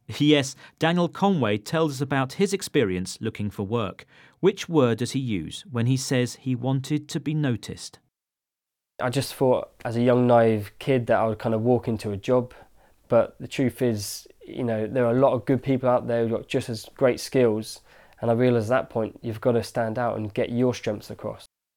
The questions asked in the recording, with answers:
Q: Which word does he use when he says he wanted to be noticed?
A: He used the phrasal verb to stand out.